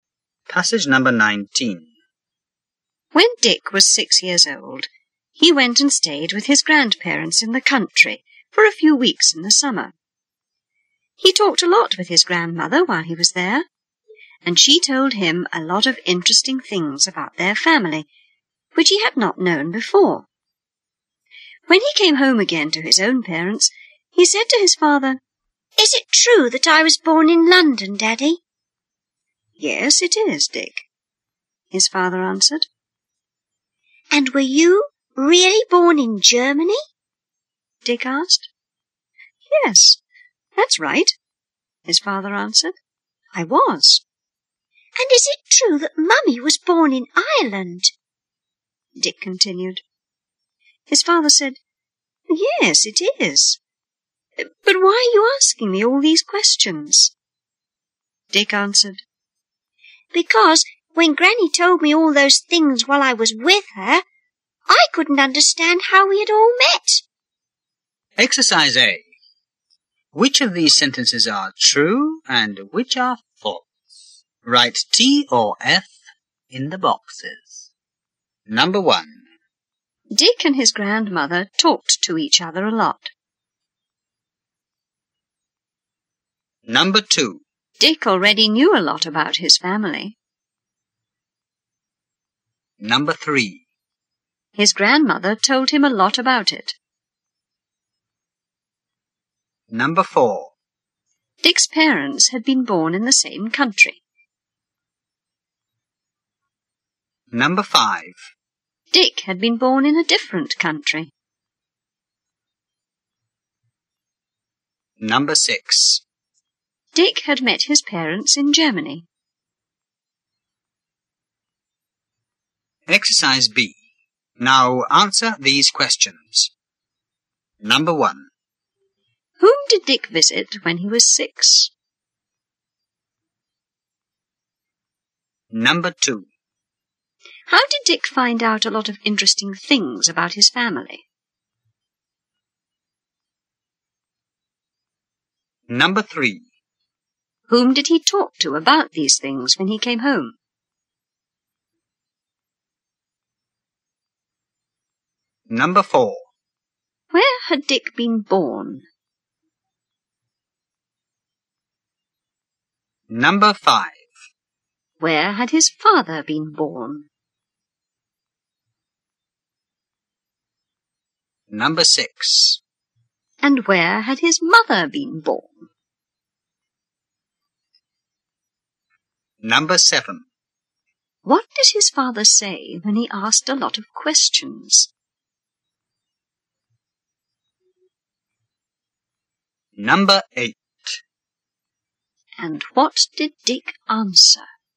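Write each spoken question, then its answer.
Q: Dick and his grandmother talked to each other a lot.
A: True

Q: Dick already knew a lot about his family.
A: False

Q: His grandmother told him a lot about it.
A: True

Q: Dick's parents had been born in the same country.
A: False

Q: Dick had been born in a different country.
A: True

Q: Dick had met his parents in Germany.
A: False

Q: Whom did Dick visit when he was 6?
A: His grandparents in the country

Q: How did Dick find out a lot of interesting things about his family?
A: His grandmother told him

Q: Whom did he talk to about these things when he came home?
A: His father

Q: Where had Dick been born?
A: In London

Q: Where had his father been born?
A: In Germany

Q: And where had his mother been born?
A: In Ireland

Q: What did his father say when he asked a lot of questions?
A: Why are you asking me all these questions?

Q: And what did Dick answer?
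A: He couldn't understand how they had all met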